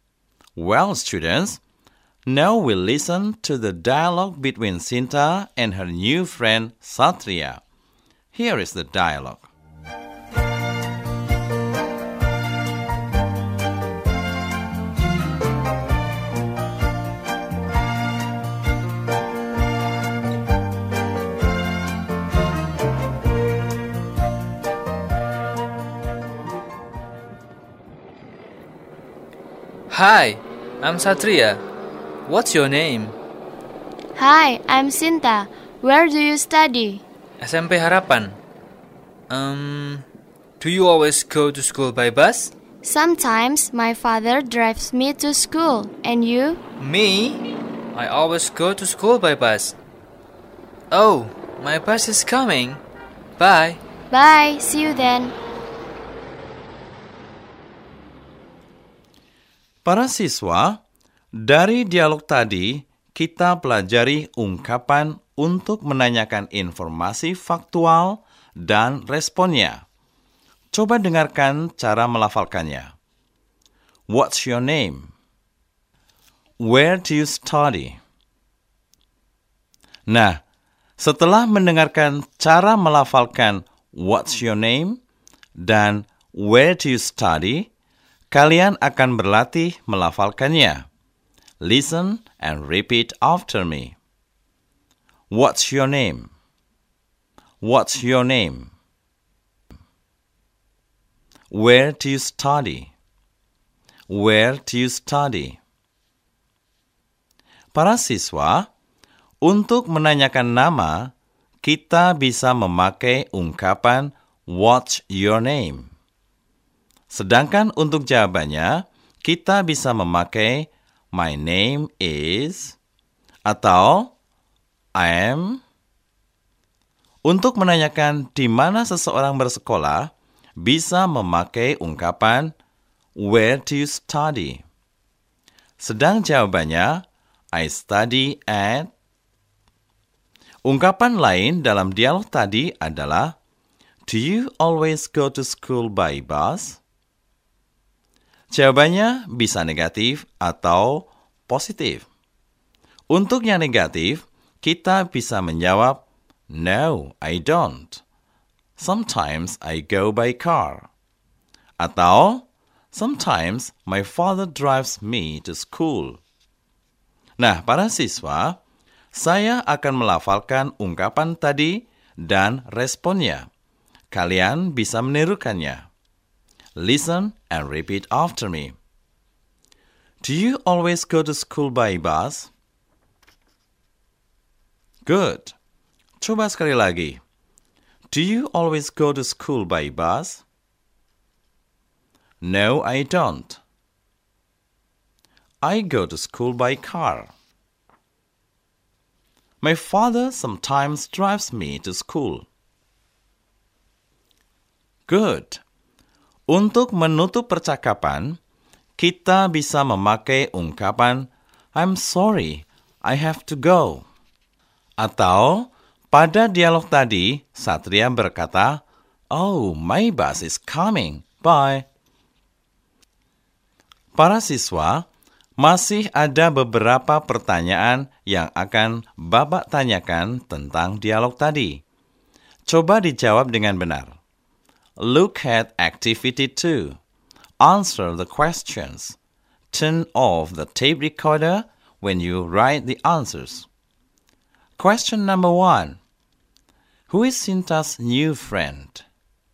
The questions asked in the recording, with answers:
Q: Who is Sinta's new friend?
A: Satria. Good. He is Satria.